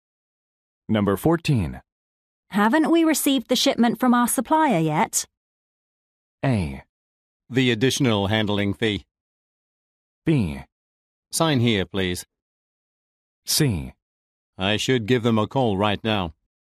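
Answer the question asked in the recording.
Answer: C: I should give them a call right now.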